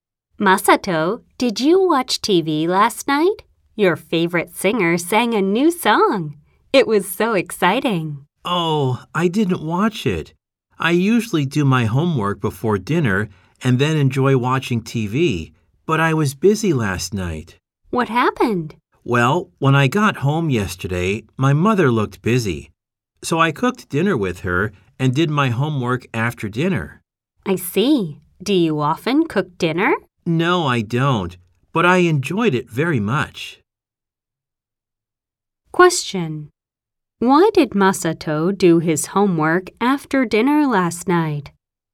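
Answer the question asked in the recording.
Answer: Because his mother looked busy, so he cooked dinner with her.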